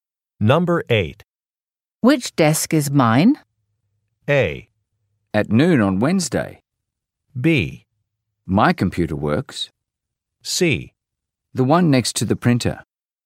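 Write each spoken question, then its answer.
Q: Which desk is mine?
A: C: The one next to the printer.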